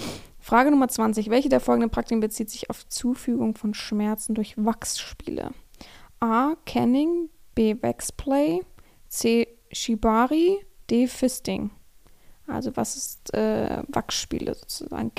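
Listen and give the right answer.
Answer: B: Waxplay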